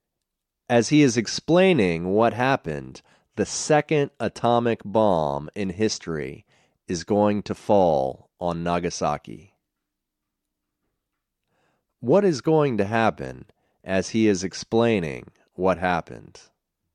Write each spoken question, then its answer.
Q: What is going to happen as he is explaining what happened?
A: As he is explaining what happened, the second atomic bomb in history is going to fall on Nagasaki.